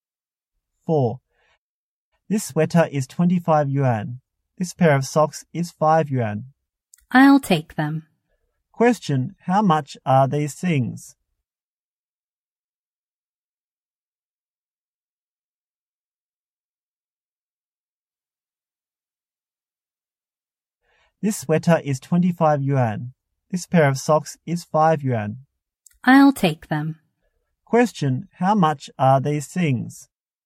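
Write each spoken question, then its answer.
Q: how much are these things?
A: 30 yuan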